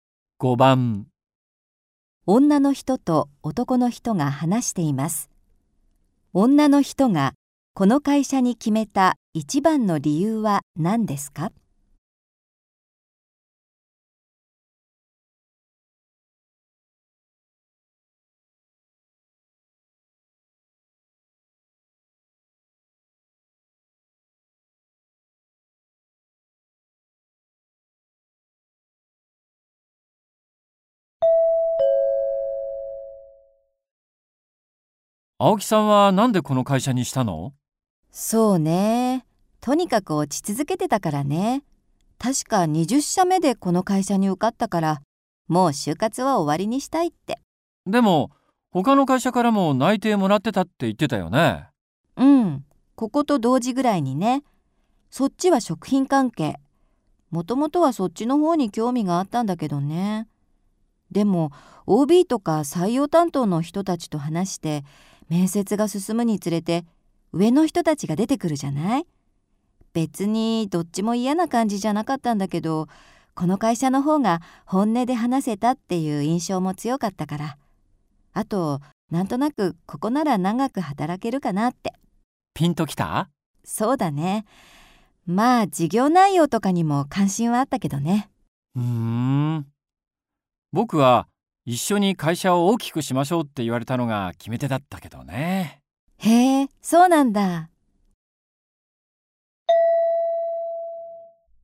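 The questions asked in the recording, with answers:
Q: 女の人がこの会社に決めた一番の理由は何ですか?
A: 会社の人たちと本音で話せたから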